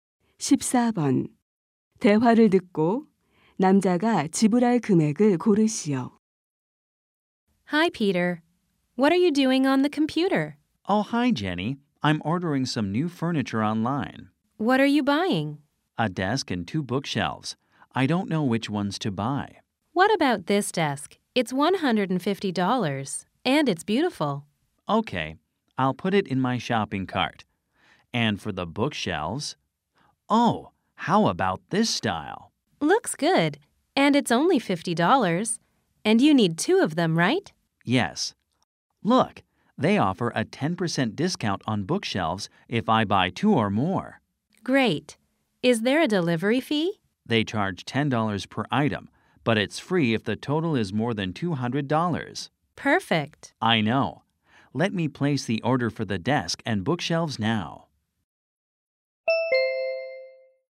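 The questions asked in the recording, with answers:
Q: 대화를 듣고 남자가 지불할 금액을 고르시오.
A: $240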